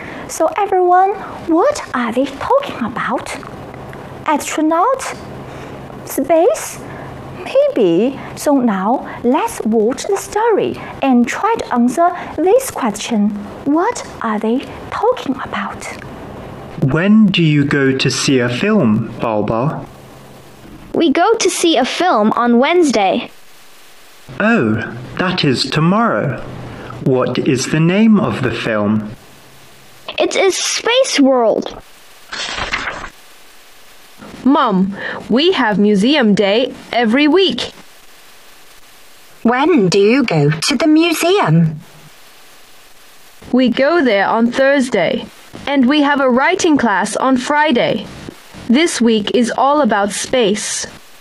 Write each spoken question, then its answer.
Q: What are they talking about?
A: So, they are talking about their school activities for Wednesday, Thursday, and Friday.